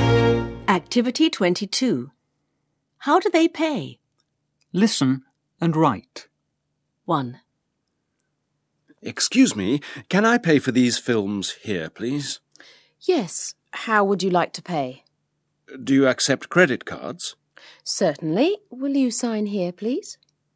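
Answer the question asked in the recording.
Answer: By credit card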